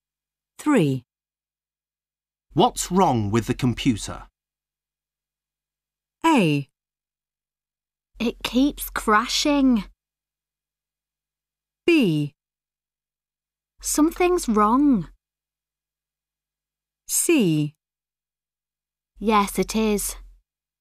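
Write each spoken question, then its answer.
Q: What's wrong with the computer?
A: A: It keeps crashing.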